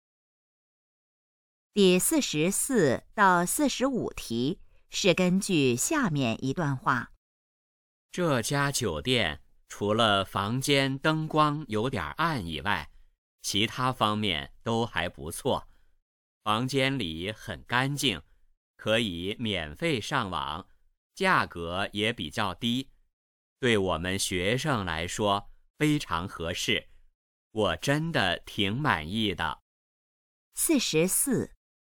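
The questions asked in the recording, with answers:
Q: 说话人觉得这个酒店哪方面不太好?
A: 房间灯光有点暗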